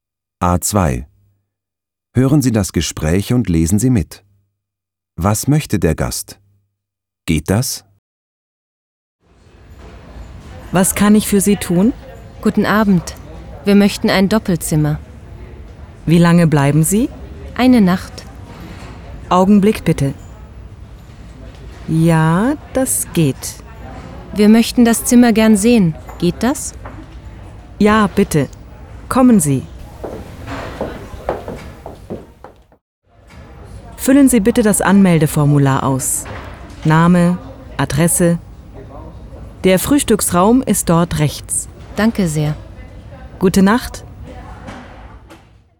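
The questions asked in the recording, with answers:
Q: Was möchte der Gast?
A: Ein Doppelzimmer für eine Nacht (und das Zimmer sehen)

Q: Geht das?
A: Ja, das geht.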